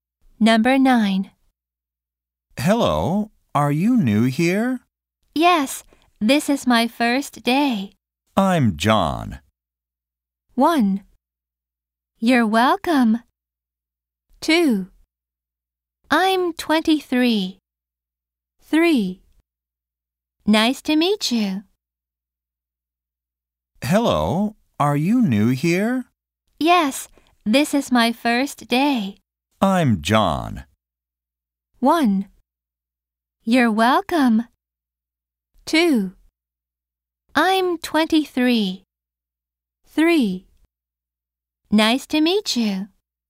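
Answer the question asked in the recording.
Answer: 3: Nice to meet you.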